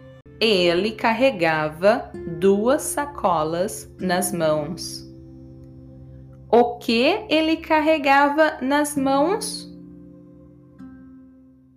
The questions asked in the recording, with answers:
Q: O que ele carregava nas mãos?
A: Duas sacolas.